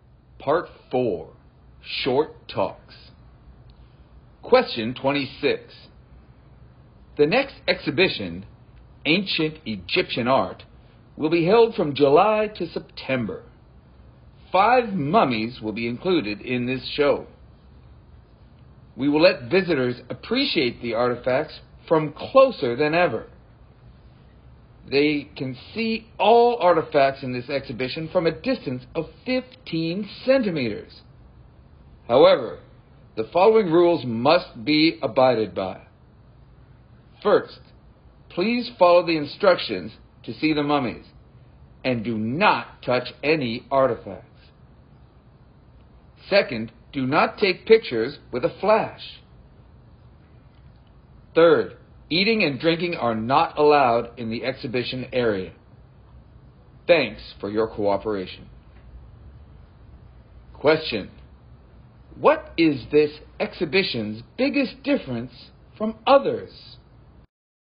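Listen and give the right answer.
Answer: Visitors can see the artifacts closer than ever, from 15 centimeters away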